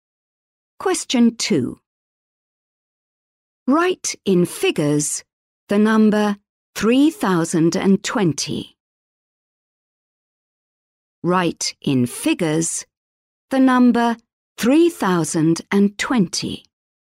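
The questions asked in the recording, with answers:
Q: Write in figures the number 3020.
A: 3020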